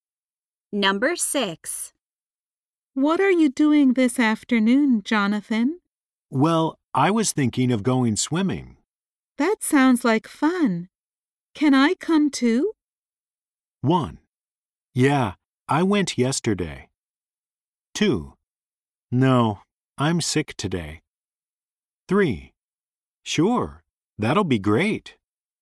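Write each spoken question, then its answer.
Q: That sounds like fun. Can I come too?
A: 3: Sure, that'll be great.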